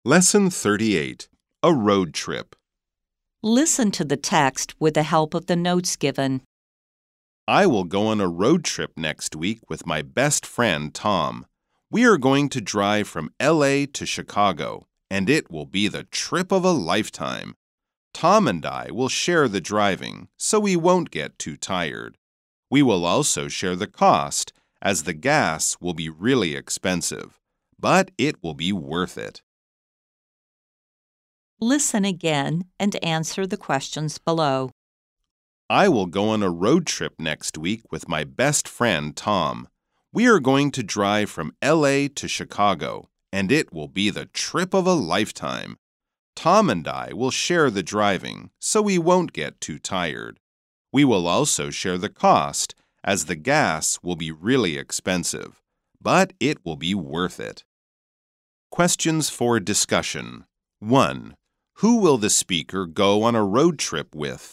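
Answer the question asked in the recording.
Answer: With his best friend, Tom.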